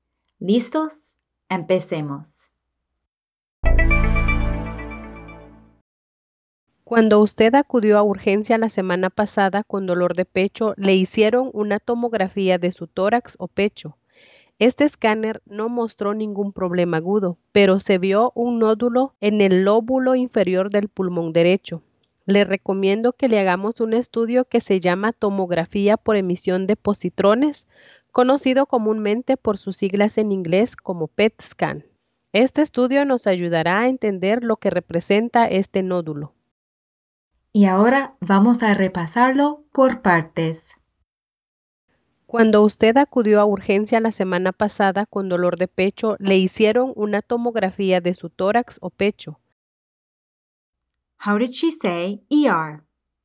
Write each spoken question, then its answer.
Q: How did she say ER?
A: Las urgencias.